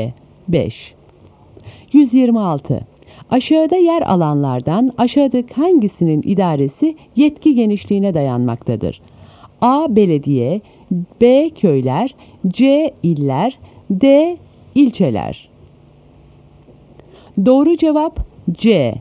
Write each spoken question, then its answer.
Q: Aşağıda yer alanlardan aşağıdaki hangisinin idaresi yetki genişliğine dayanmaktadır?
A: Doğru cevap C.